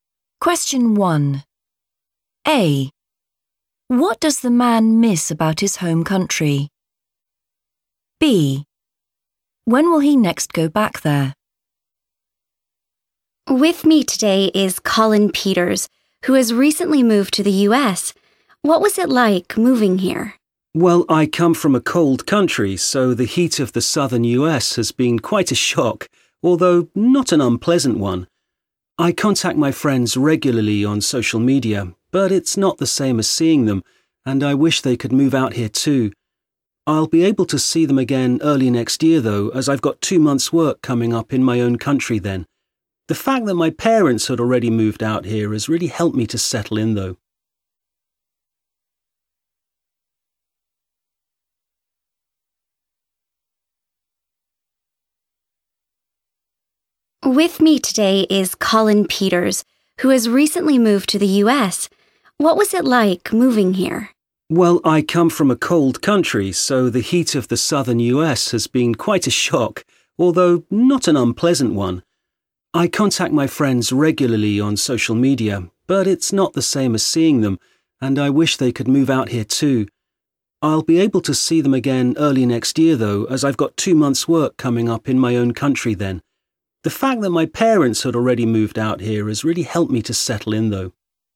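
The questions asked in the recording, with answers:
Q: What does the man miss about his home country?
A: his friends

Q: When will he next go back there?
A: early next year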